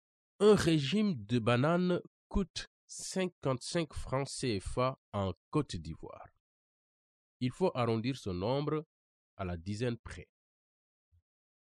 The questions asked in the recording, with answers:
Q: Il faut arrondir ce nombre à la dizaine près.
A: Ma réponse est 60.